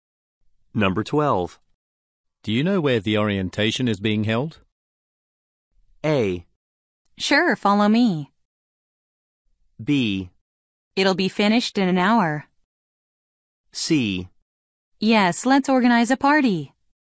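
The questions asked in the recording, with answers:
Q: Do you know where the orientation is being held?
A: A: Sure, follow me.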